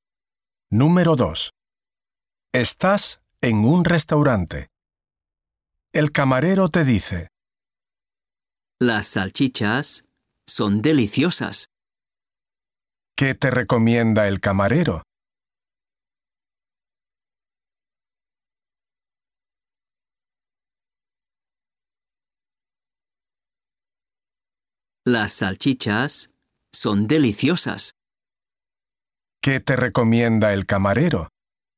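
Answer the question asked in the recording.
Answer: Las salchichas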